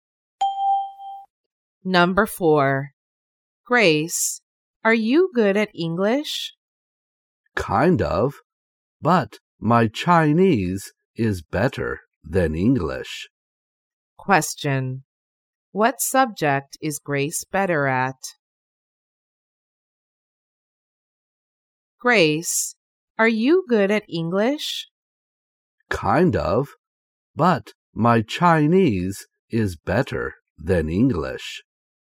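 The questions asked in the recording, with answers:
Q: What subject is Grace better at?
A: Chinese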